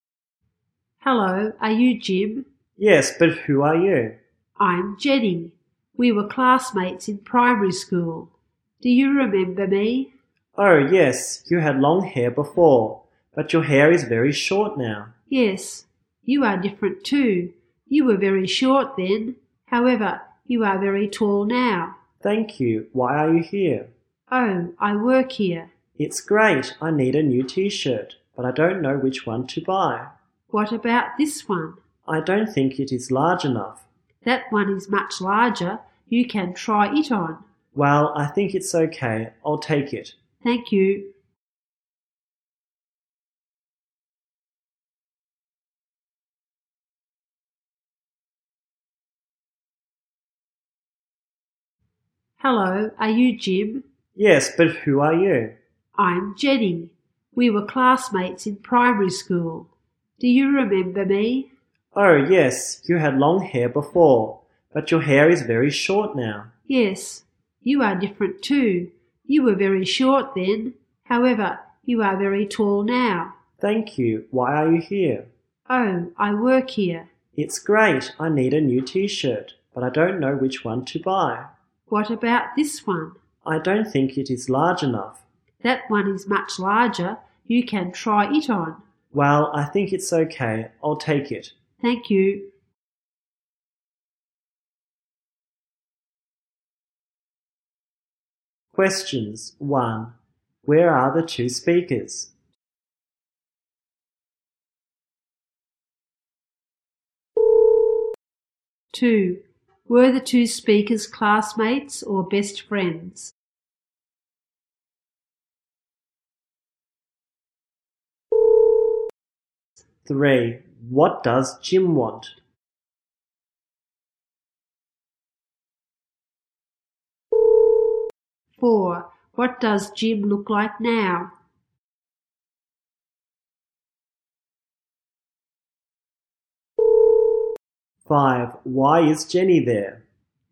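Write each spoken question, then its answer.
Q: Were the two speakers classmates or best friends?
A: Classmates

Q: What does Jim want?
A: A new T-shirt

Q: What does Jim look like now?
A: Very tall

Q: Why is Jenny there?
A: She works there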